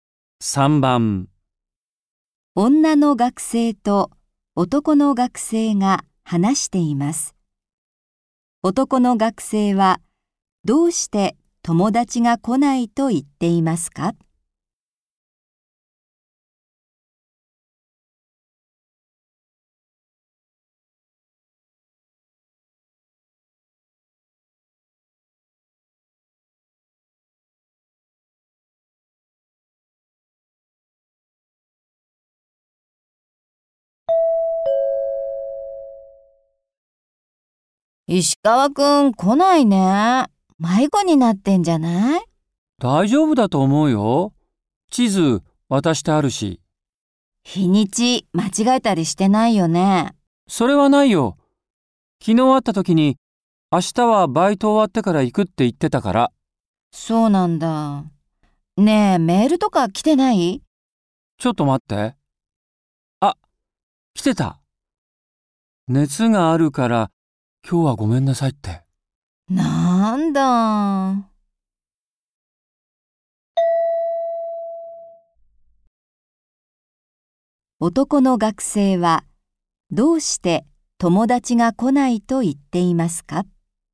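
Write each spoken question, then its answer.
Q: 男の学生は、どうして友達が来ないと言っていますか?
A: 熱があるから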